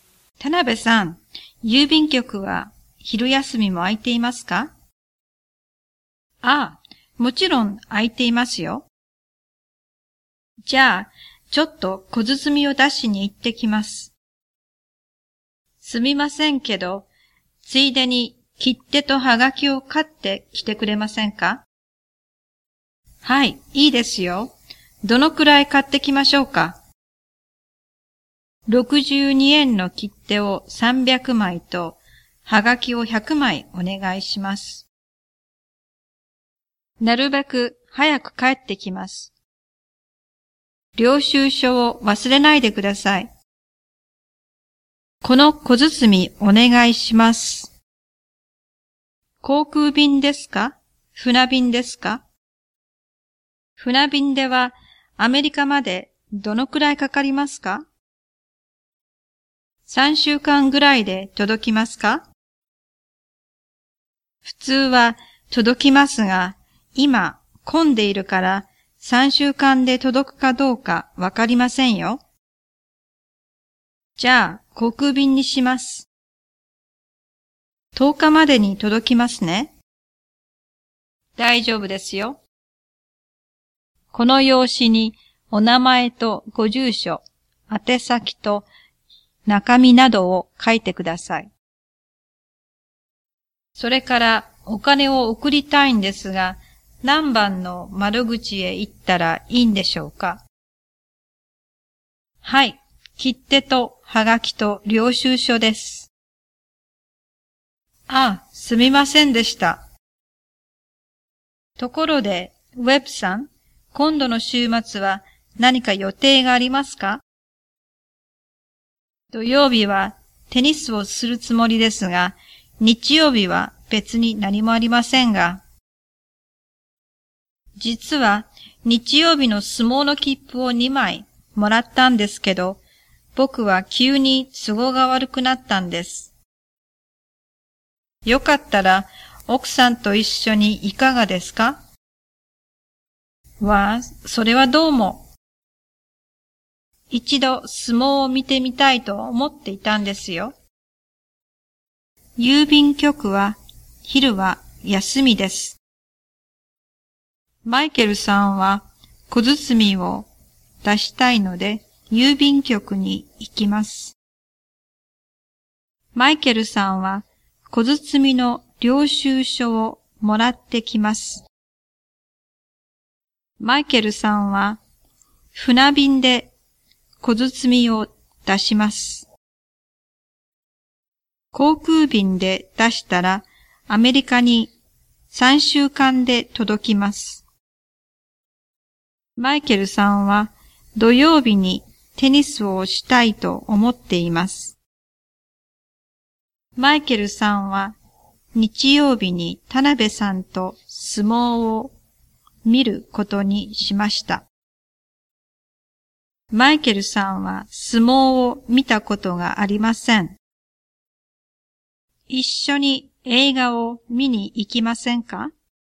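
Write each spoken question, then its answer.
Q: 郵便局は昼は休みです。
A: いいえ(昼休みも空いています)

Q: マイケルさんは小包みを出したいので郵便局に行きます。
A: はい

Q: マイケルさんは船便で小包みを出します。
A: いいえ(航空便で出します)

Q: 航空便で出したらアメリカに3週間で届きます。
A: いいえ(10日までに届きます)

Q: マイケルさんは土曜日にテニスをしたいと思っています。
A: はい

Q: マイケルさんは日曜日に田辺さんと相撲を見ることにしました。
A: いいえ(奥さんと見に行きます)

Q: マイケルさんは相撲を見たことがありません。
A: はい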